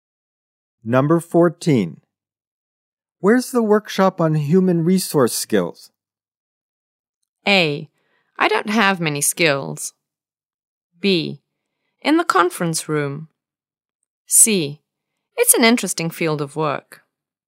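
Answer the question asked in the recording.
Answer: B: In the conference room.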